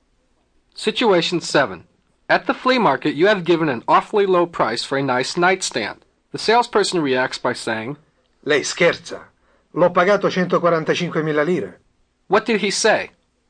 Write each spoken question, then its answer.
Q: What did he say?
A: You are kidding. I paid 145,000 lire for it.